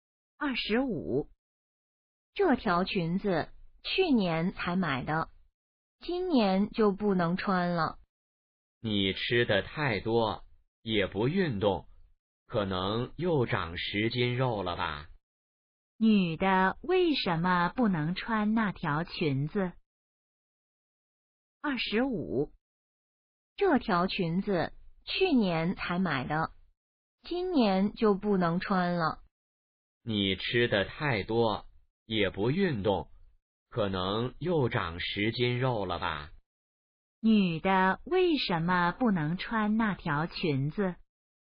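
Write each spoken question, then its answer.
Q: 女的为什么不能穿那条裙子?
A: 她胖了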